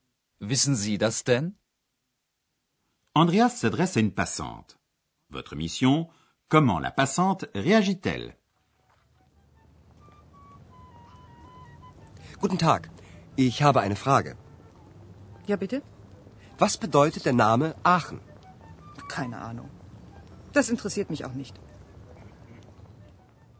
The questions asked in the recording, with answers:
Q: Votre mission, comment la passante réagit-elle?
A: La passante n'a aucune idée.